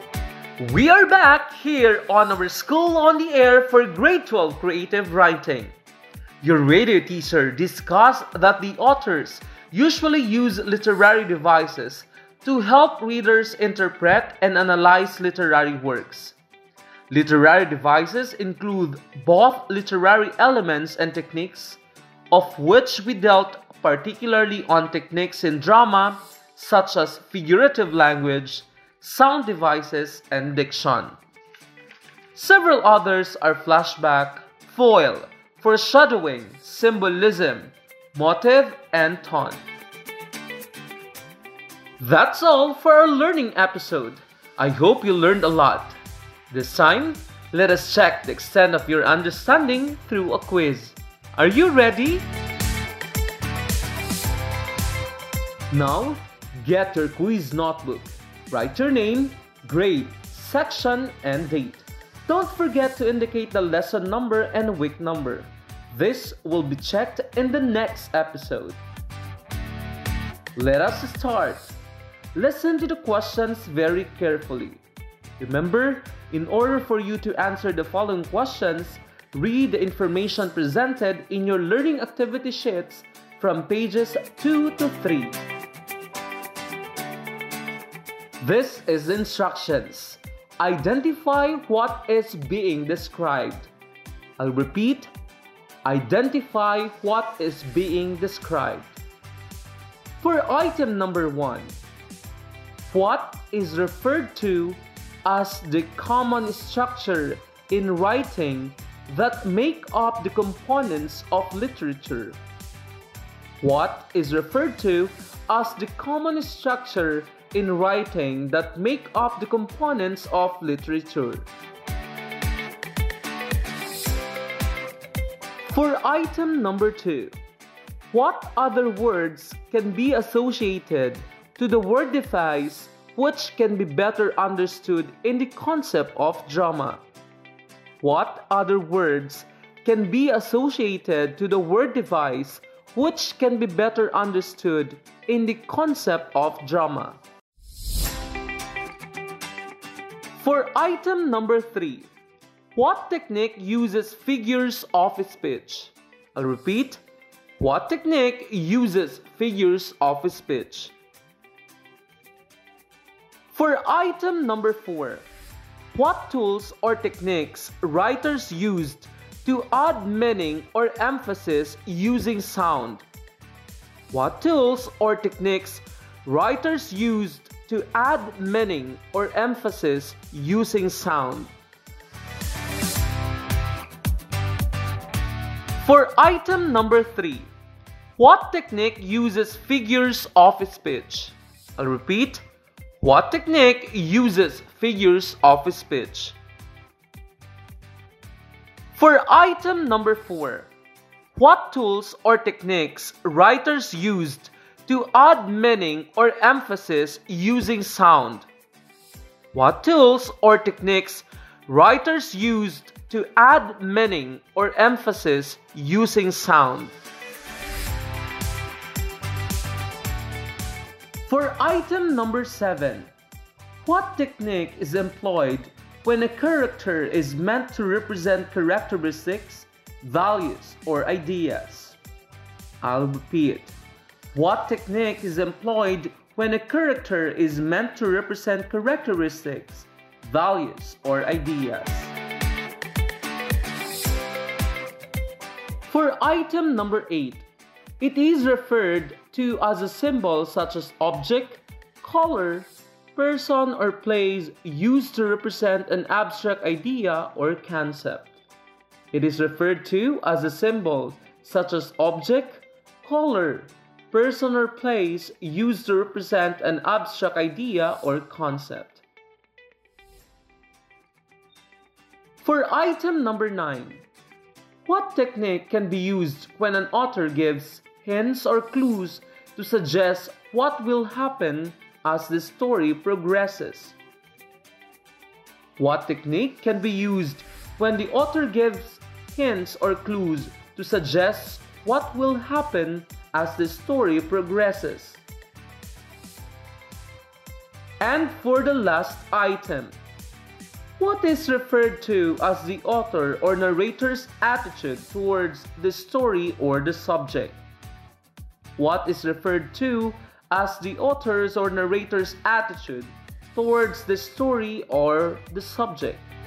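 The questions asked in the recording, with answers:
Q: what technique uses figures of speech?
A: figurative language

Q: what tools or techniques writers used to add meaning or emphasis using sound?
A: sound devices

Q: what technique can be used when an author gives hints or clues to suggest what will happen as the story progresses?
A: foreshadowing

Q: what is referred to as the author or narrator's attitude towards the story or the subject?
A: tone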